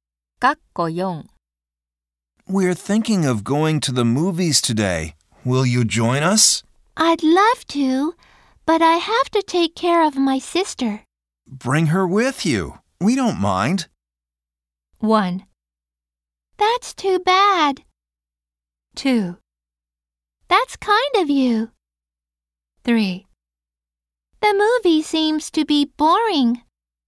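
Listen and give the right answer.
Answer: 2: That's kind of you.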